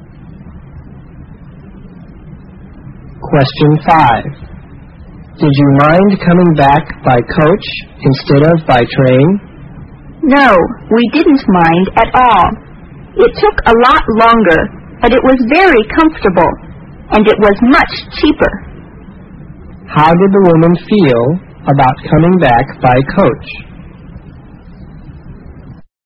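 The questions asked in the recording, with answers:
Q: How did the woman feel about coming back by coach?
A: She didn't mind; it was comfortable and cheaper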